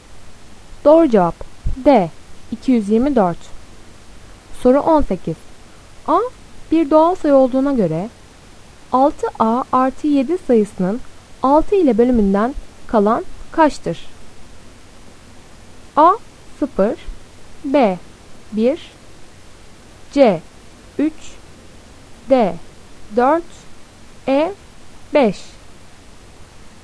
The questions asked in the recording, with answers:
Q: A bir doğal sayı olduğuna göre 6A artı 7 sayısının 6 ile bölümünden kalan kaçtır?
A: Doğru cevap B 1.